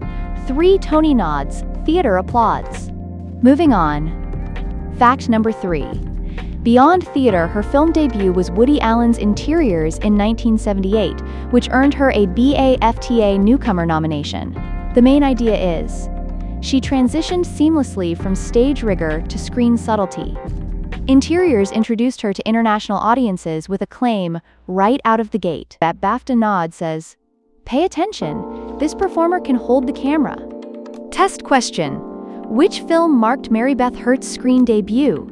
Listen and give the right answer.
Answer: Correct answer, Interiors.